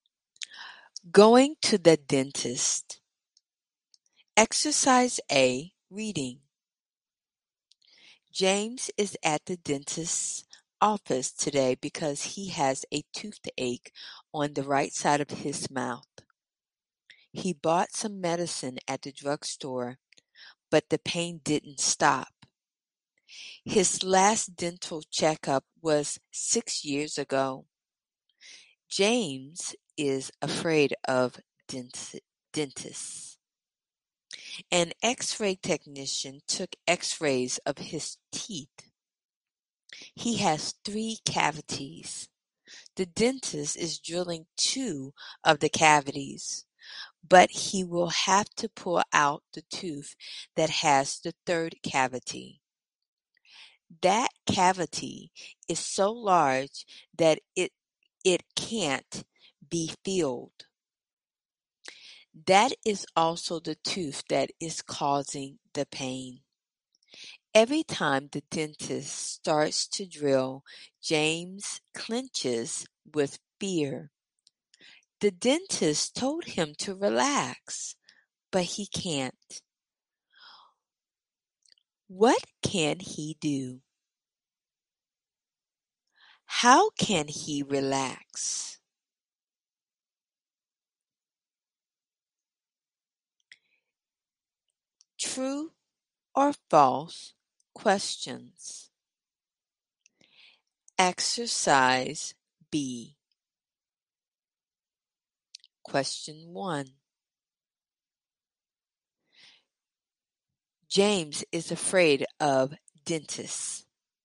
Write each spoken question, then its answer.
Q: James is afraid of dentists.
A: True.